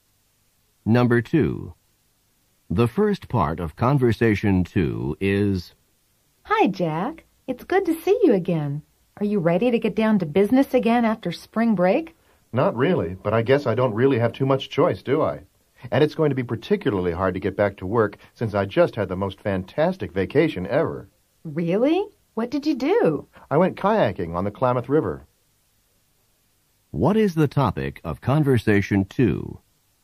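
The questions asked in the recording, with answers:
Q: What is the topic of Conversation 2?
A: A kayaking trip on the Klamath River over spring break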